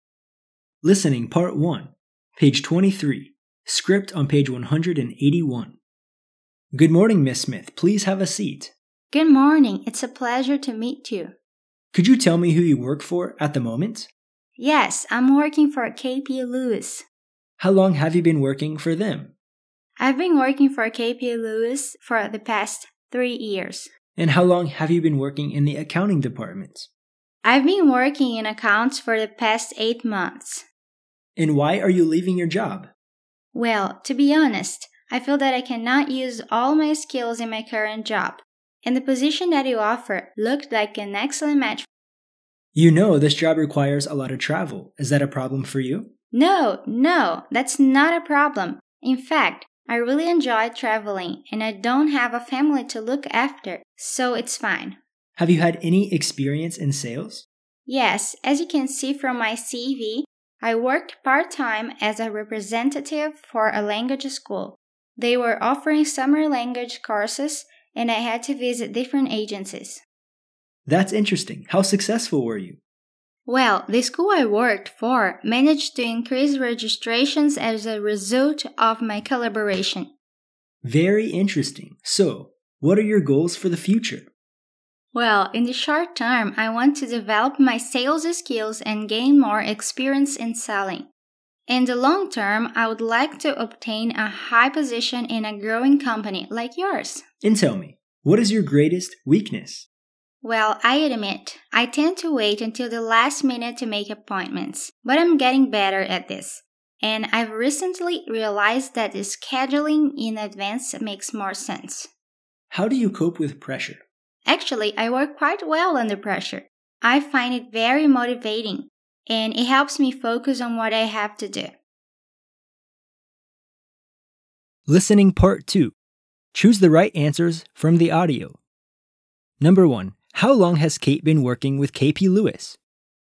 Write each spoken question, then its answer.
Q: How long has Kate been working with KP Lewis?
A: 3 years.